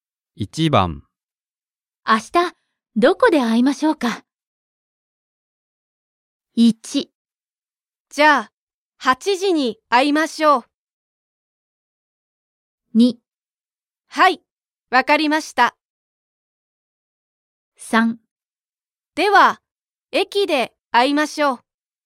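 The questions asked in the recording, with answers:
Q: 明日どこで会いましょうか。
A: 3: では駅で会いましょう。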